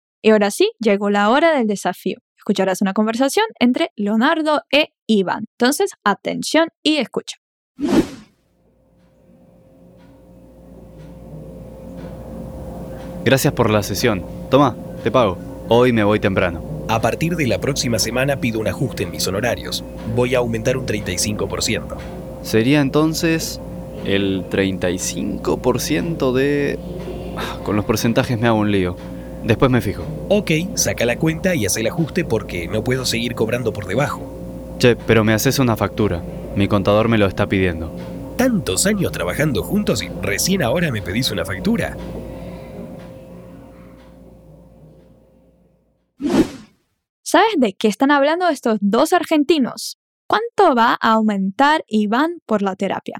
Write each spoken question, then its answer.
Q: ¿Cuánto va a aumentar Iván por la terapia?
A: un 35%.